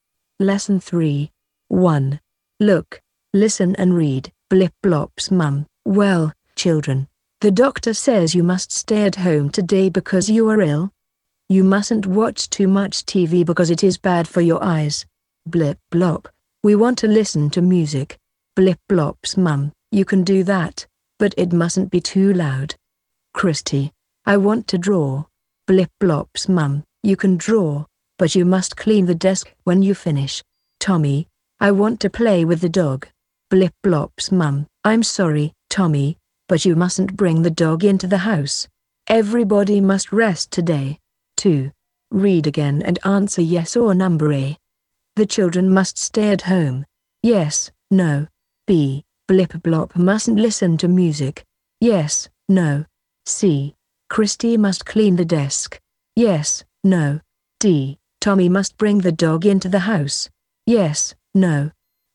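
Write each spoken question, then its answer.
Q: The children must stay at home.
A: Yes

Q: Blip blop mustn't listen to music.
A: No

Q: Christy must clean the desk.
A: Yes

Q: Tommy must bring the dog into the house.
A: No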